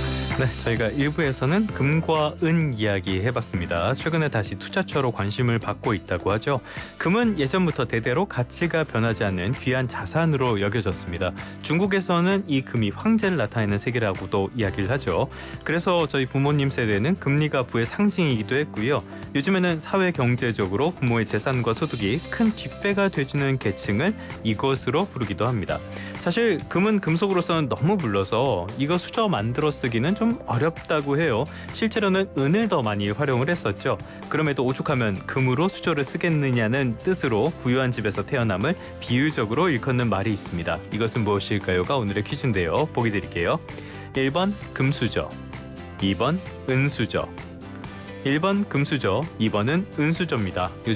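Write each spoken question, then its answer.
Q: 이것은 무엇일까요?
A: 1: 금수저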